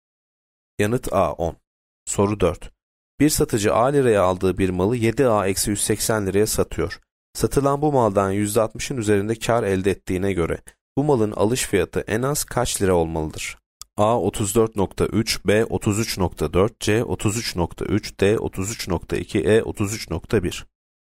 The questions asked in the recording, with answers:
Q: Satılan bu maldan %60'ın üzerinde kar elde ettiğine göre bu malın alış fiyatı en az kaç lira olmalıdır?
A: B 33.4.